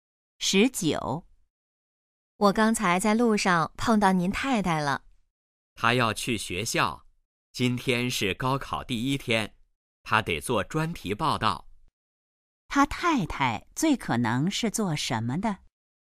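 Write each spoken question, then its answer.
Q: 他太太最可能是做什么的?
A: 记者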